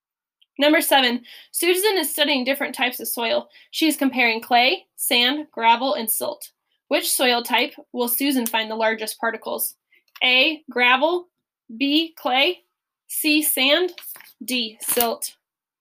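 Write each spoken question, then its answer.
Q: Which soil type will Susan find the largest particles?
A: A: gravel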